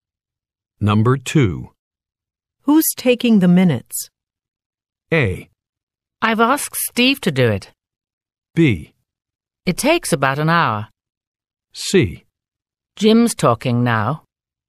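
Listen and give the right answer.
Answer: A: I've asked Steve to do it.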